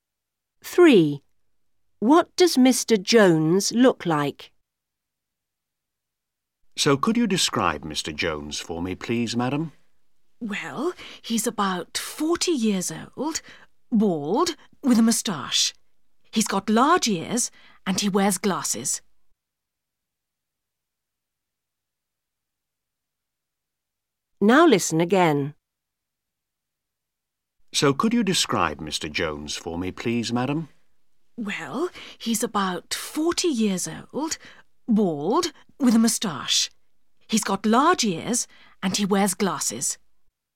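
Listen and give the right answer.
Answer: About 40, bald, with a moustache, large ears and glasses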